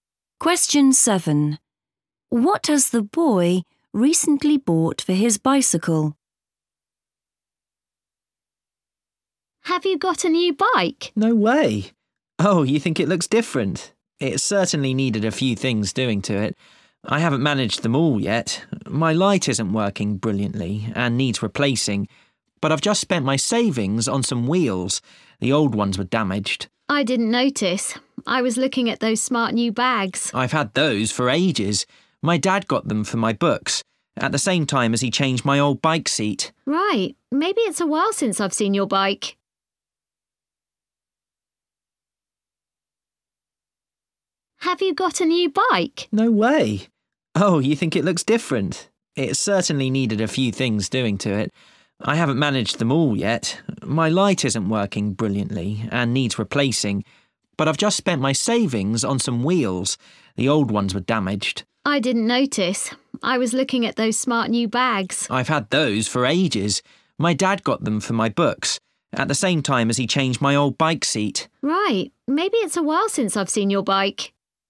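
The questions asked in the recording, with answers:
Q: What has the boy recently bought for his bicycle?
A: wheels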